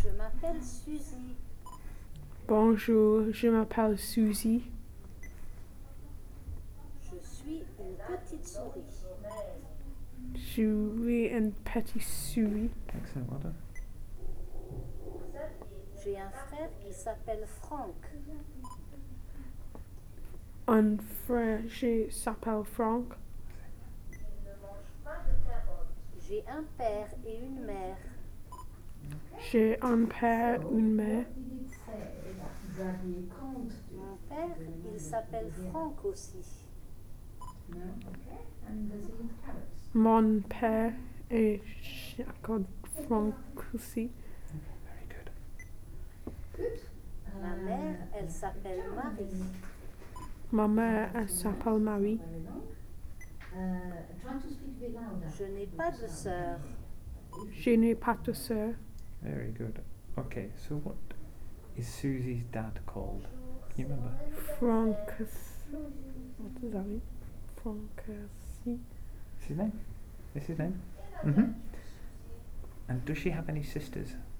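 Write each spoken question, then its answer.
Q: Okay, so what is Susie's dad called?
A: Franck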